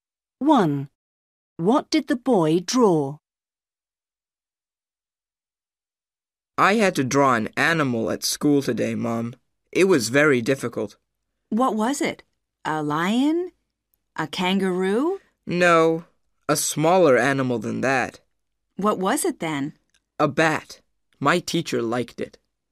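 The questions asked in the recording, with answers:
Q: What did the boy draw?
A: A bat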